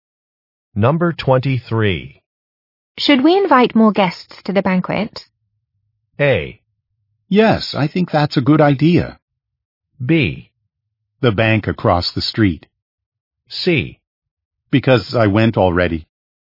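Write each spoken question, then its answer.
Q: Should we invite more guests to the banquet?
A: A: Yes, I think that's a good idea.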